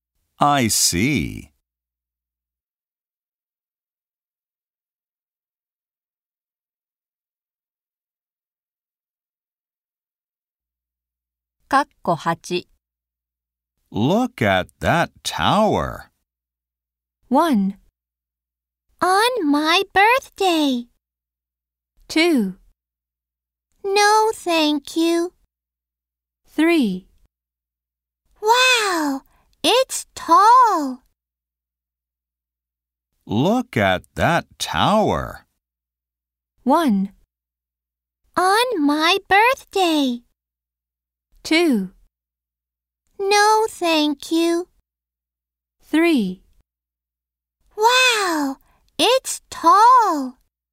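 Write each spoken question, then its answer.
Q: Look at that tower.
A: 3: Wow, it's tall.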